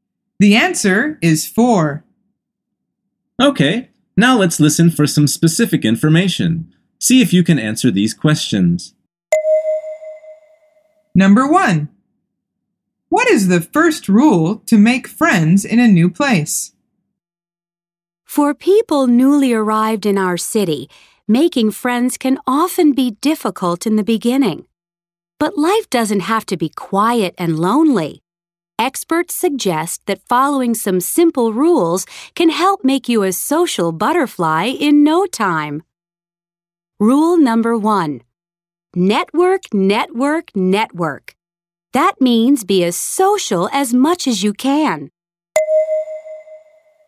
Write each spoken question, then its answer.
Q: What is the first rule to make friends in a new place?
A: The answer is to network.